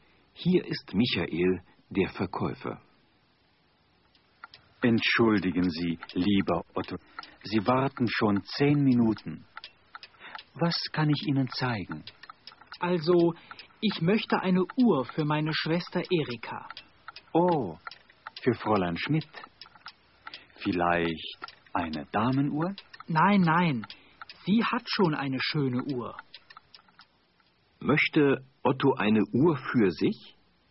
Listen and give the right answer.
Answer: Nein, er möchte keine Uhr für sich.